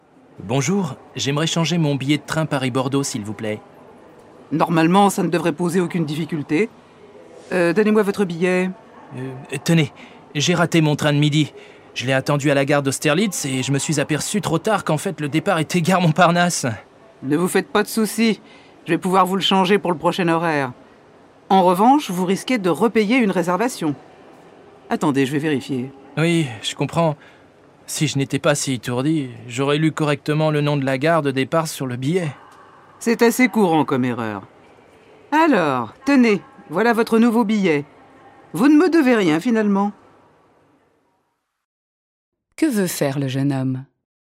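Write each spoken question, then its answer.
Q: Que veut faire le jeune homme ?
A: Changer son billet de train Paris-Bordeaux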